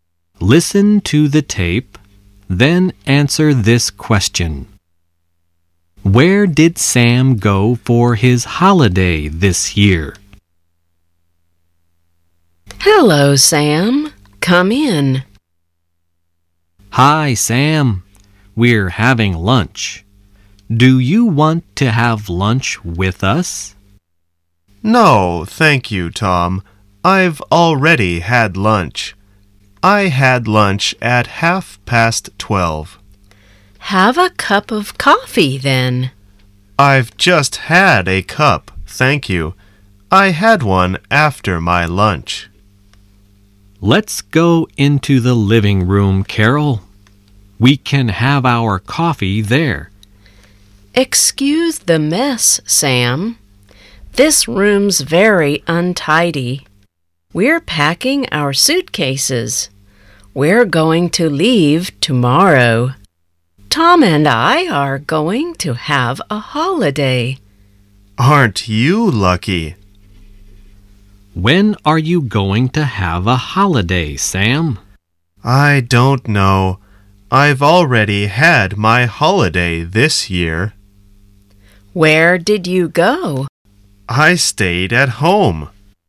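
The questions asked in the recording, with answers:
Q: Where did Sam go for his holiday this year?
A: He stayed at home.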